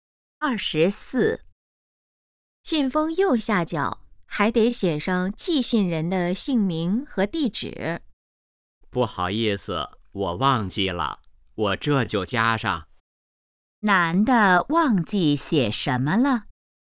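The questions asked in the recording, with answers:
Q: 男的忘记写什么了?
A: 寄信人的姓名和地址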